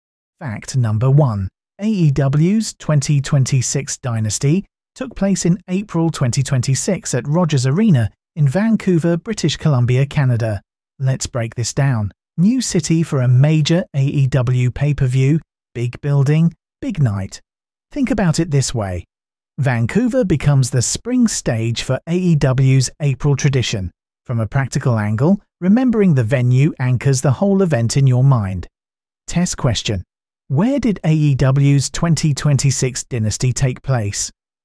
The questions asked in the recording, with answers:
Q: Where did AEW's 2026 Dynasty take place?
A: Rogers Arena, Vancouver.